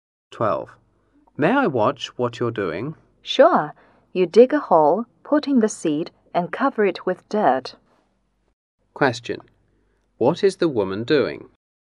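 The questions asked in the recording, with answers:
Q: What is the woman doing?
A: Planting seeds.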